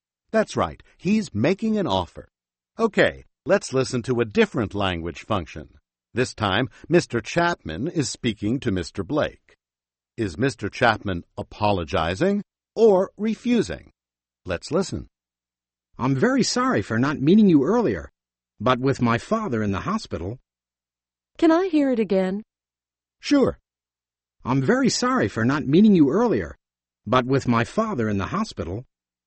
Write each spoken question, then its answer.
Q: Is Mr. Chapman apologizing or refusing?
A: He's apologizing.